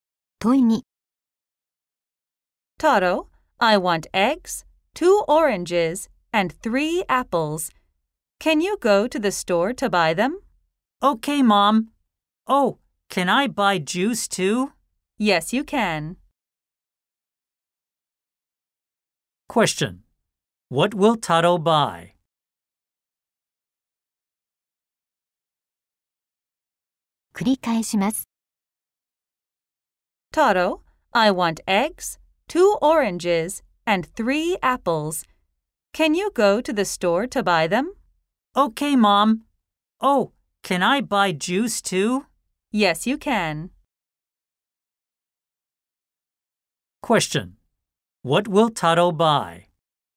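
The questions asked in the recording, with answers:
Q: What will Taro buy?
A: Eggs, two oranges, three apples and juice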